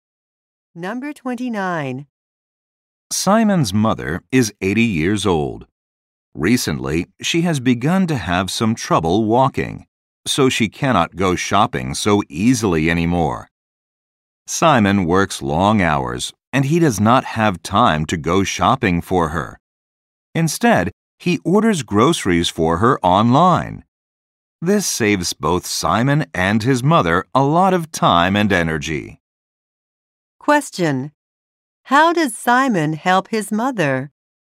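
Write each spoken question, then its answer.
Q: How does Simon help his mother?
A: He orders her groceries online.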